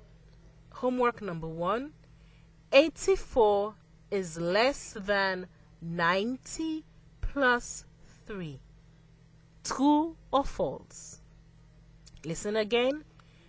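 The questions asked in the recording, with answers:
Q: Homework number one 84 is less than 90 plus 3 true or false.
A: True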